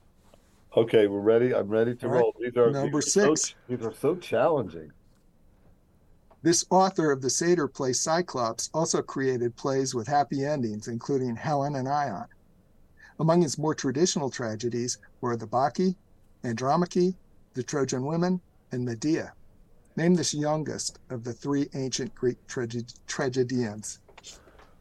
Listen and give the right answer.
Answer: Euripides.